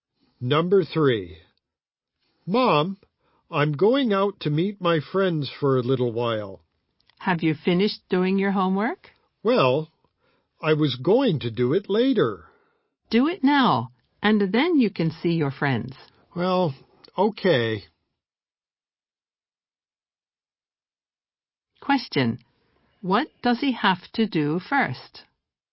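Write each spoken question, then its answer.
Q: Question. What does he have to do first?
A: Finish his homework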